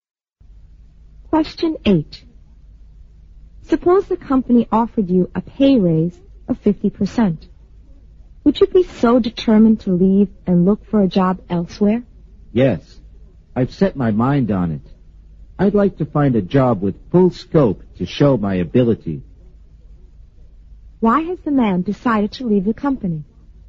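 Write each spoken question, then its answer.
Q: Why has the man decided to leave the company?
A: He wants a job with full scope to show his ability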